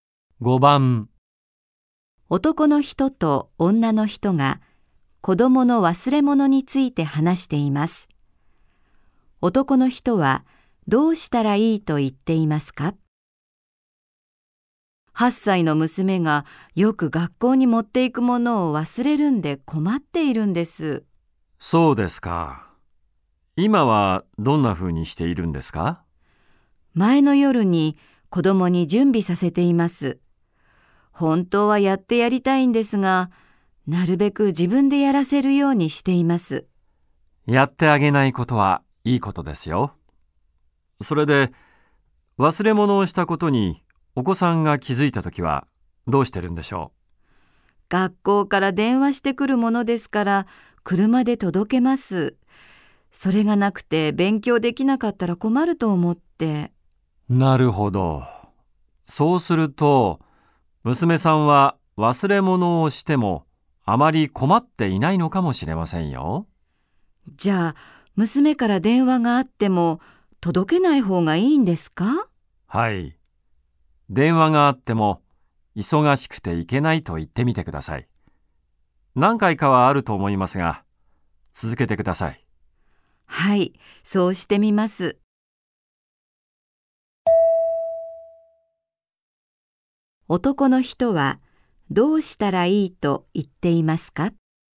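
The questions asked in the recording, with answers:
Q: 男の人はどうしたらいいと言っていますか?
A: 娘から電話があっても、忘れ物を届けない方がいい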